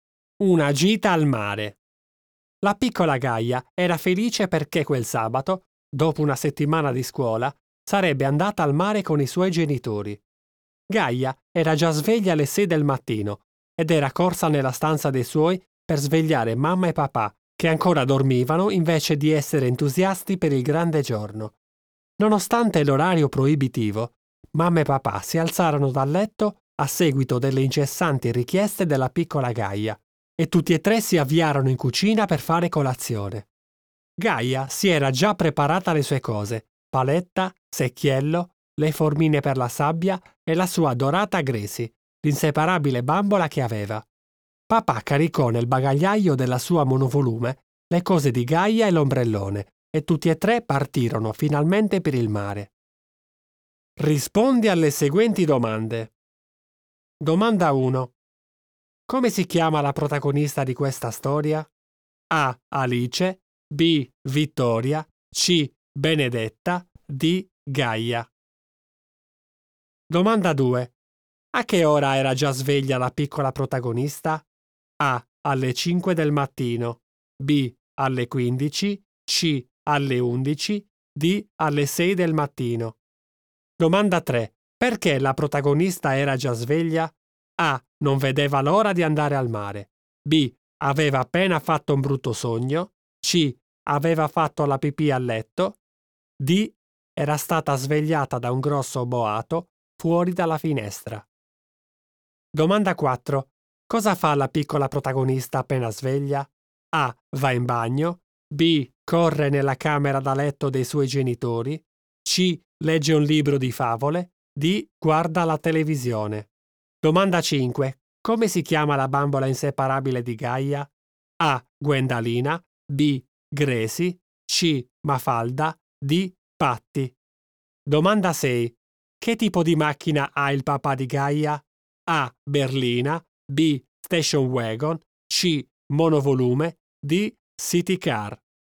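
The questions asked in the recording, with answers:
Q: Come si chiama la protagonista di questa storia?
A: D: Gaia

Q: A che ora era già sveglia la piccola protagonista?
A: D: Alle 6 del mattino

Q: Perché la protagonista era già sveglia?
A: A: Non vedeva l'ora di andare al mare

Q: Cosa fa la piccola protagonista appena sveglia?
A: B: Corre nella camera da letto dei suoi genitori

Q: Come si chiama la bambola inseparabile di Gaia?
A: B: Gracie

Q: Che tipo di macchina ha il papà di Gaia?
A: C: Monovolume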